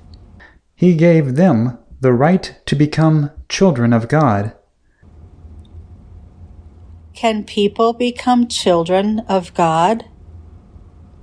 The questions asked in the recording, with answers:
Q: Can people become children of God?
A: Yes, people can become children of God.